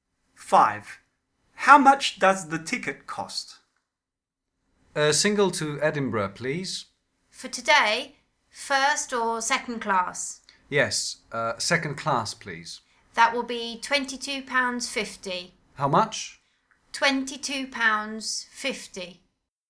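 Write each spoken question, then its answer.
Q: How much does the ticket cost?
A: £22.50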